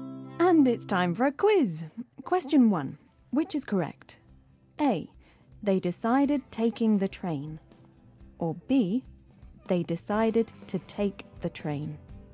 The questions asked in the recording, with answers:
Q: Which is correct?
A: OK, so this is B. They decided to take the train.